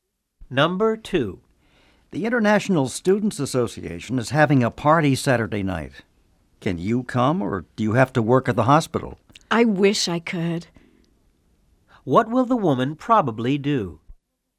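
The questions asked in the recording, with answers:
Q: What will the woman probably do?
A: She will work at the hospital and not go to the party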